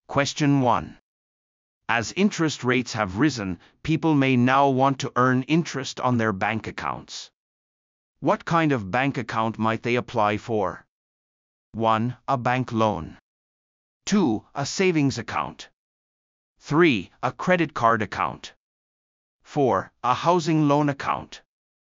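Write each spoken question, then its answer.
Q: What kind of bank account might they apply for?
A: 2: A savings account.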